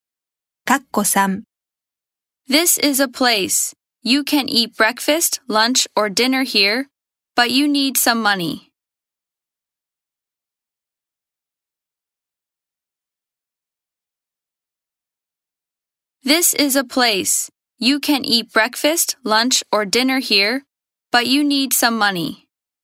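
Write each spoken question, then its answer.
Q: This is a place. You can eat breakfast, lunch, or dinner here, but you need some money.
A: restaurant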